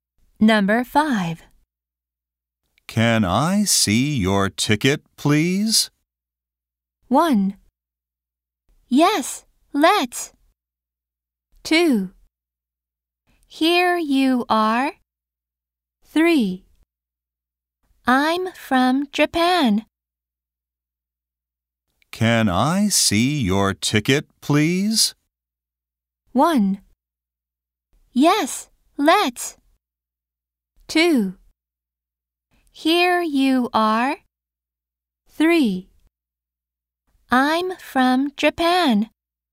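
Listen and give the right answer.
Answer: 2: Here you are.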